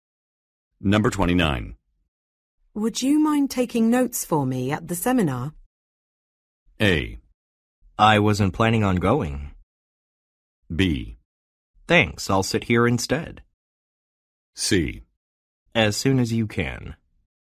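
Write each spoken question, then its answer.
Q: Would you mind taking notes for me at the seminar?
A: A: I wasn't planning on going.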